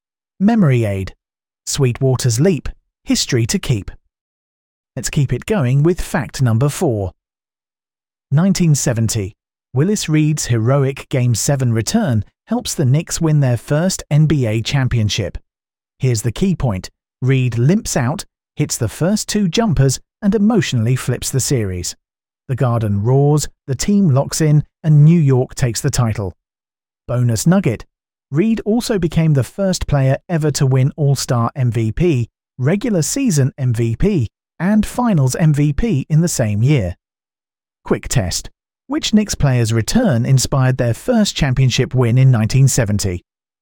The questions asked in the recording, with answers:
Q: which Knicks player's return inspired their first championship win in 1970?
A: Correct answer, Willis Reed.